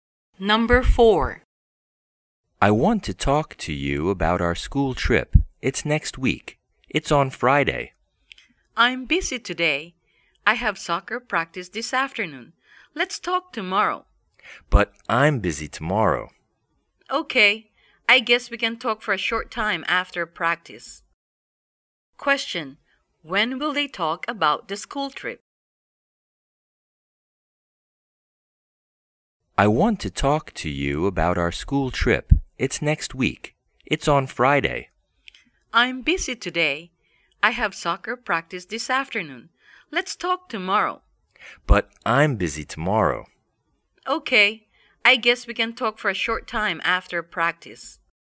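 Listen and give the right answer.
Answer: Today, for a short time after soccer practice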